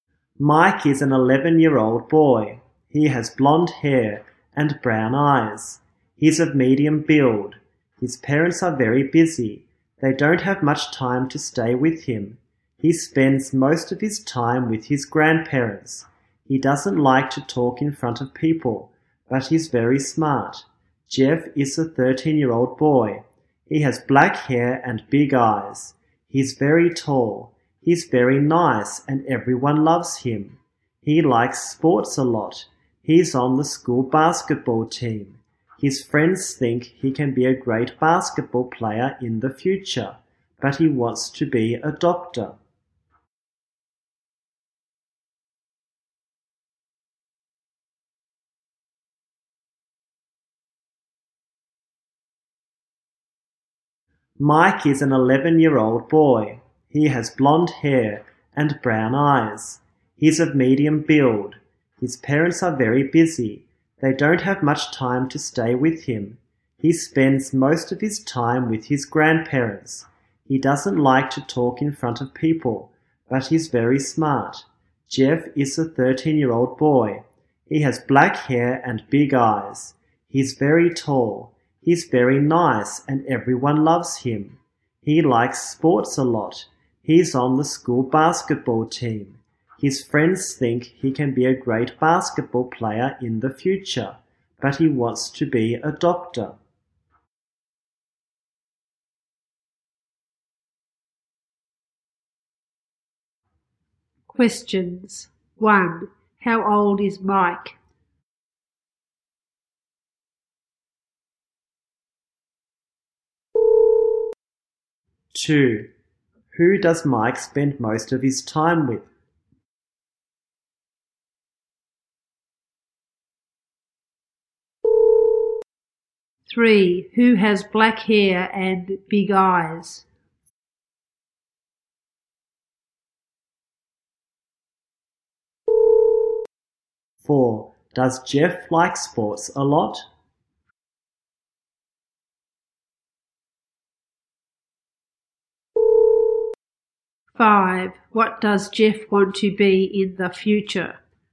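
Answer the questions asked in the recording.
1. 11 years old
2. His grandparents
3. Jeff
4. Yes, he does
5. A doctor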